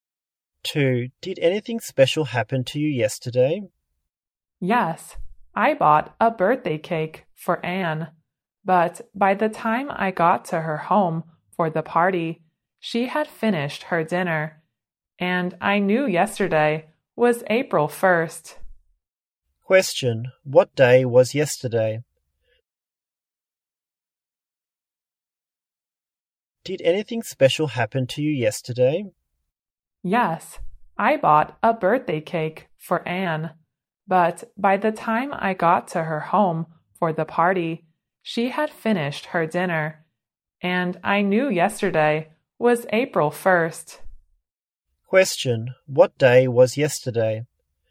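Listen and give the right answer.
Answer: April Fool's Day (April 1st)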